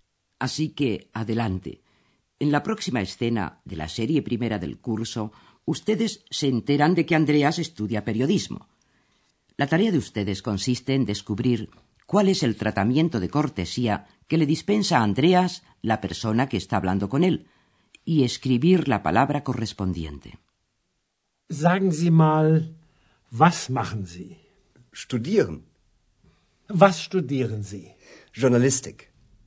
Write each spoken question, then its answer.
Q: La tarea de ustedes consiste en descubrir cuál es el tratamiento de cortesía que le dispensa a Andreas la persona que está hablando con él y escribir la palabra correspondiente.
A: En primer lugar, se buscó la fórmula de cortesía, que en alemán es Sie, usted.